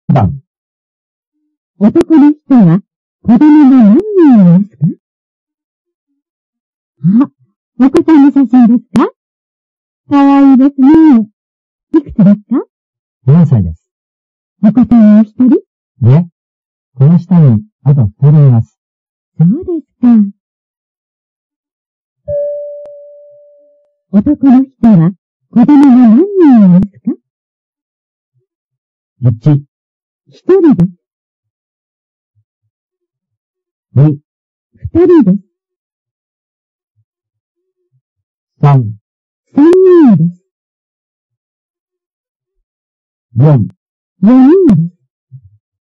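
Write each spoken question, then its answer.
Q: 男の人は子供が何人いますか?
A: 3: 3人です。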